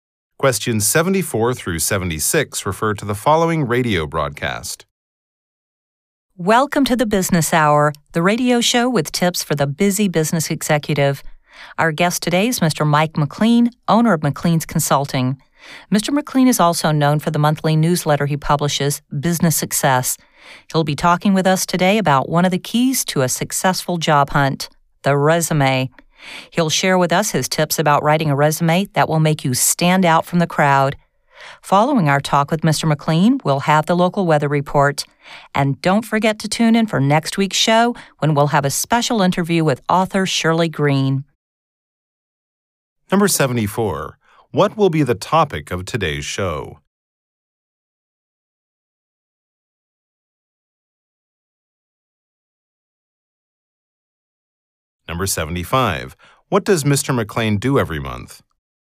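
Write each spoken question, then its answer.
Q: today's show?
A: Writing a resume

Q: What does Mr. McLean do every month?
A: Publishes a newsletter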